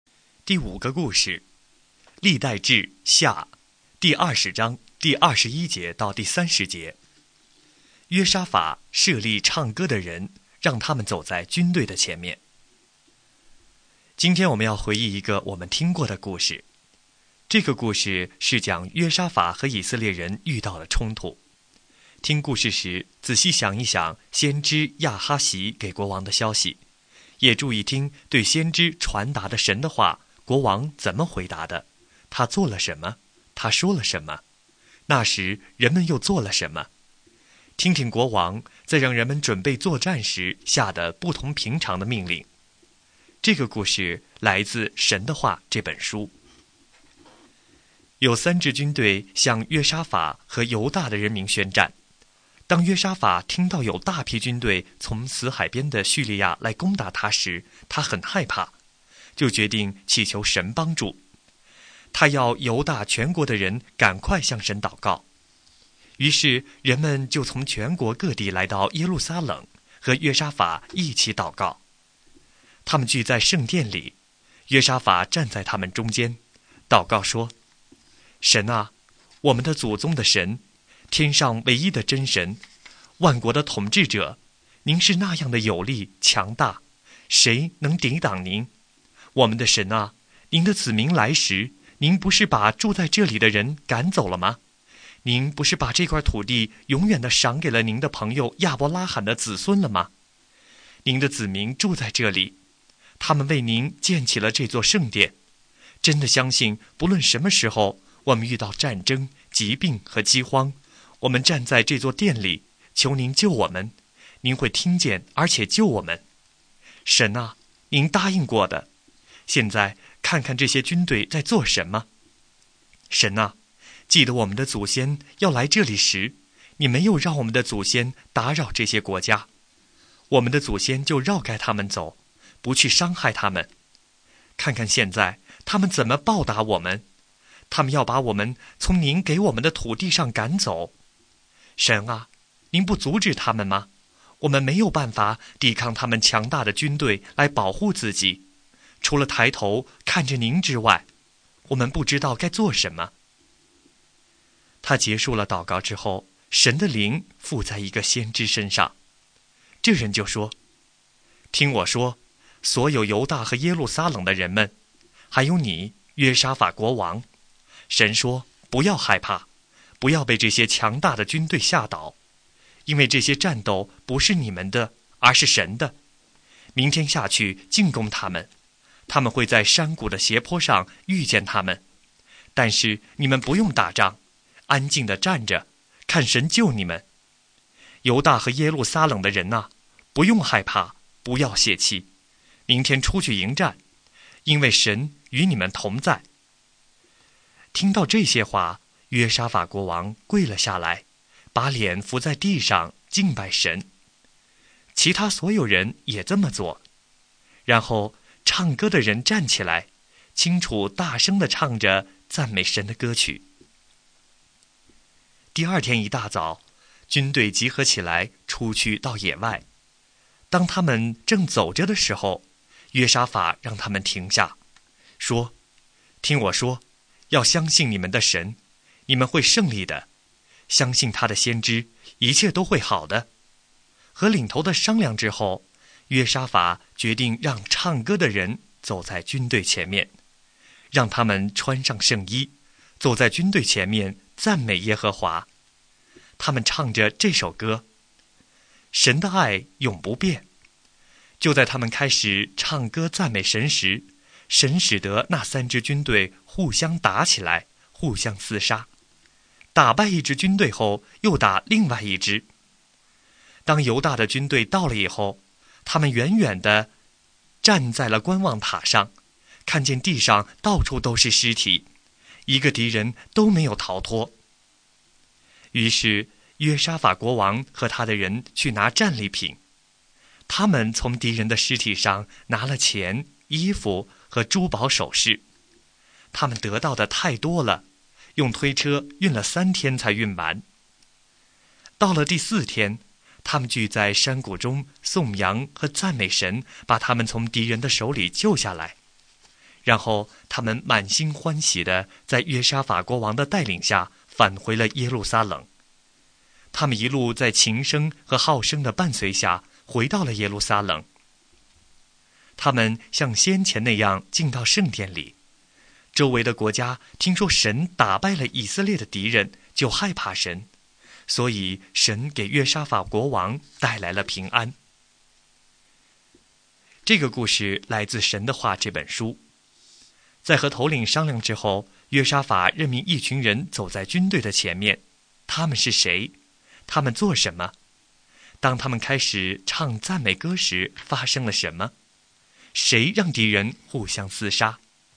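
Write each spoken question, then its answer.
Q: 在和头领商量之后,约沙法任命一群人走在军队的前面,他们是谁?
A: 唱歌的人

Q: 他们做什么?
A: 穿上圣衣,走在军队前面唱歌赞美耶和华

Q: 当他们开始唱赞美歌时,发生了什么?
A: 神使三支敌军互相打起来、互相厮杀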